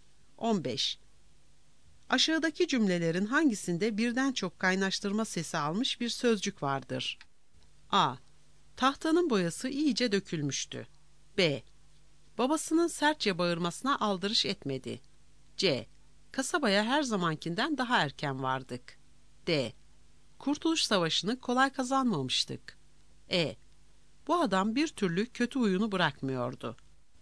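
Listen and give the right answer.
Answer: B: Babasının sertçe bağırmasına aldırış etmedi.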